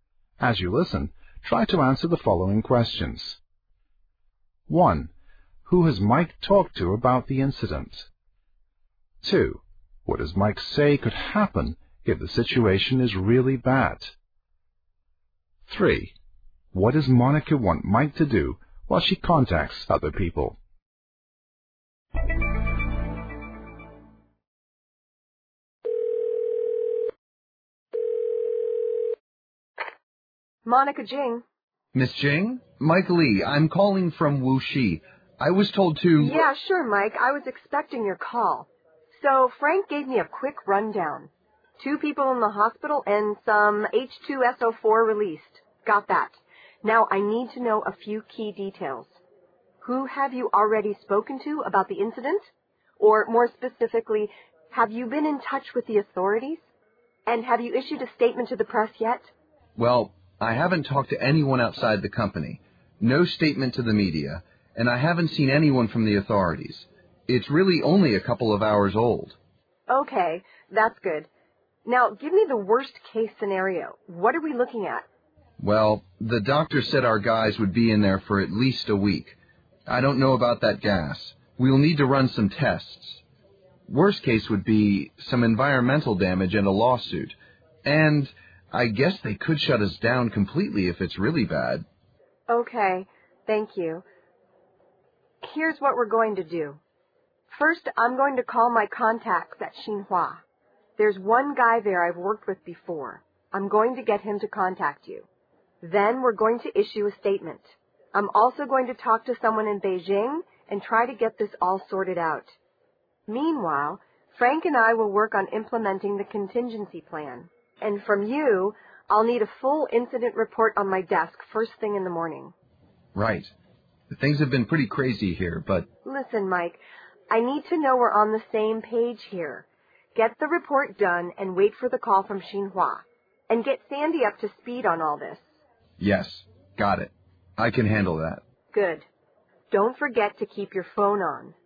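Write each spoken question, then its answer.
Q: Who has Mike talked to about the incident?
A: No one outside the company; not the media or the authorities

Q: What does Mike say could happen if the situation is really bad?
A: They could shut the factory down completely (also environmental damage and a lawsuit)

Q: What does Monica want Mike to do while she contacts other people?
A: Write a full incident report, wait for the call from Xinhua, and get Sandy up to speed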